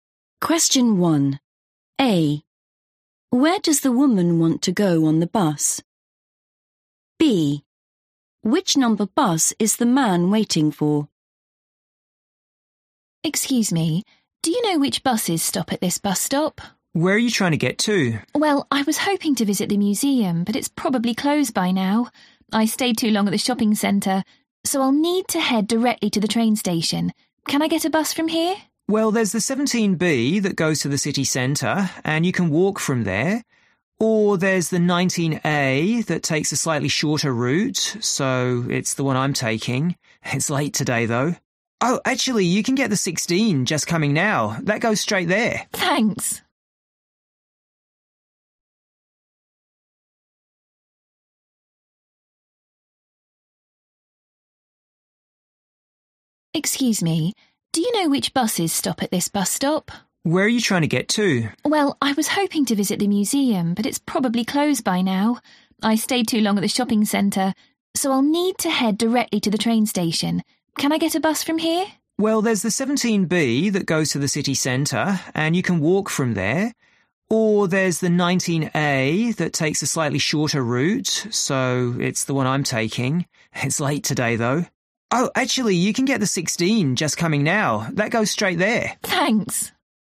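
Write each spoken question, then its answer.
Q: Where does the woman want to go on the bus?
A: the train station

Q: Which number bus is the man waiting for?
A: 19A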